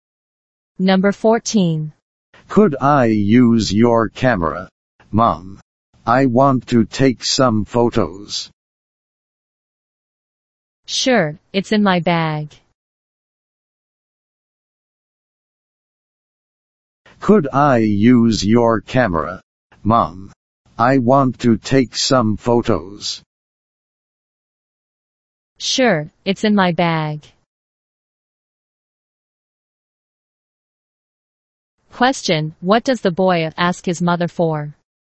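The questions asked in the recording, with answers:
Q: Question, what does the boy ask his mother for?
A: Her camera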